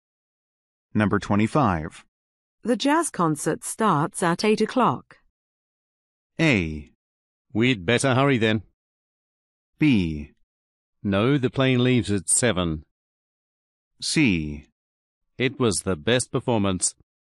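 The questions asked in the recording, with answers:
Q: The jazz concert starts at 8 o'clock.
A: A: We'd better hurry then.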